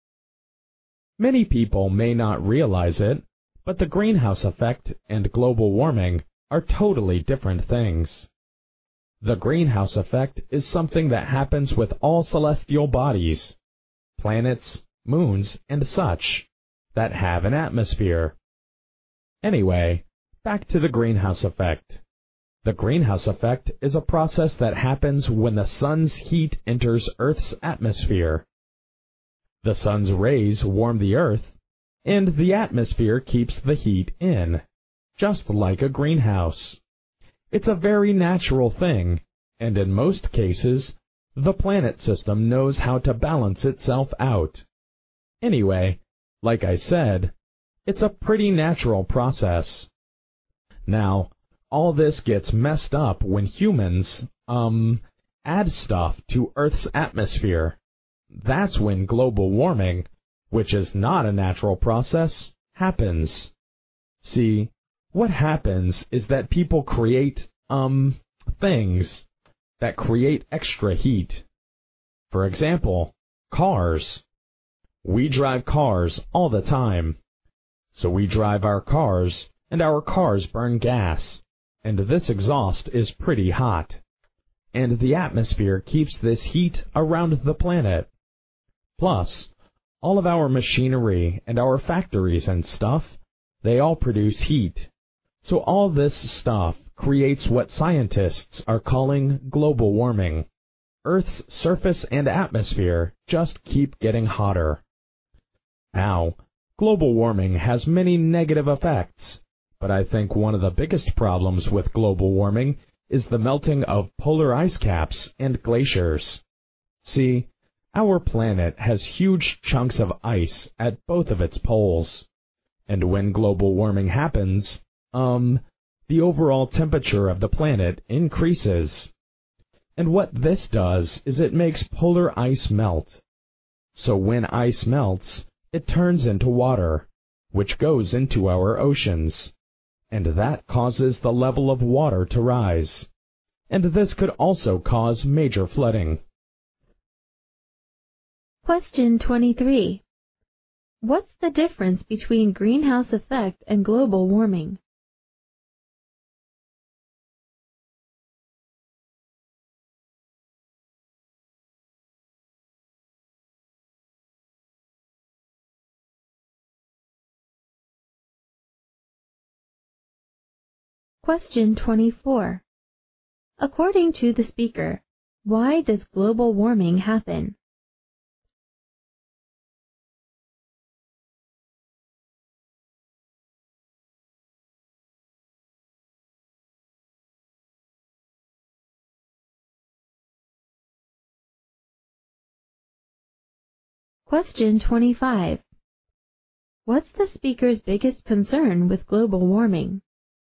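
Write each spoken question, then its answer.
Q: What's the difference between greenhouse effect and global warming?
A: The greenhouse effect is a natural process, while global warming is caused by humans and is not natural

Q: According to the speaker, why does global warming happen?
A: Because humans add extra heat to the atmosphere, from things like cars, machinery and factories

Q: What's the speaker's biggest concern with global warming?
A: The melting of polar ice caps and glaciers, which makes sea levels rise and could cause flooding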